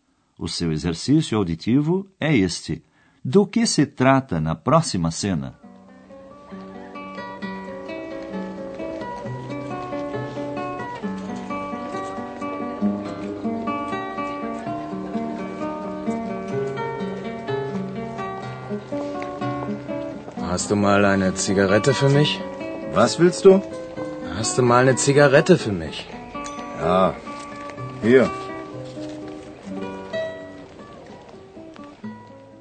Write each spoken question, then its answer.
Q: Do que se trata na próxima cena?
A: É simples. Um jovem quer um cigarro e pede ao rapaz.